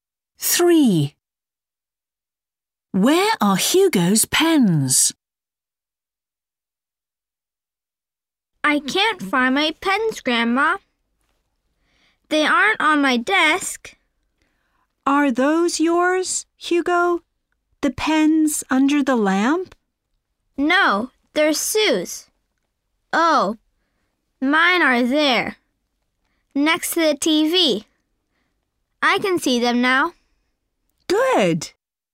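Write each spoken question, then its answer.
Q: Where are Hugo's pens?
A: Next to the TV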